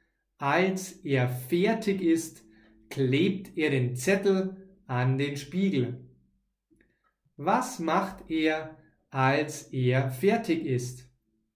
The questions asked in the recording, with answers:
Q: Was macht er, als er fertig ist.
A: Er klebt den Zettel an den Spiegel.